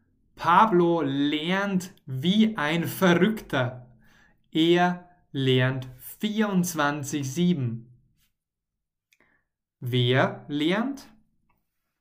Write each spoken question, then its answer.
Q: Wer lernt?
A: Pablo, Pablito, unser Freund Pablo.